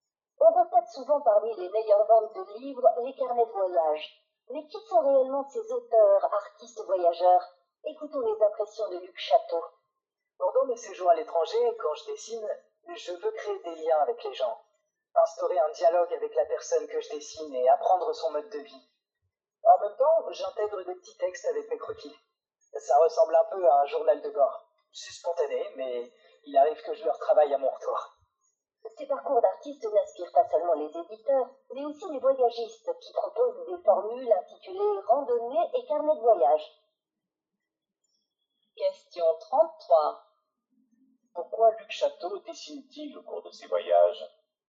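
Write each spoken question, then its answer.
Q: Pourquoi Luc Chateau dessine-t-il au cours de ses voyages ?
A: Pour créer des liens avec les gens et apprendre leur mode de vie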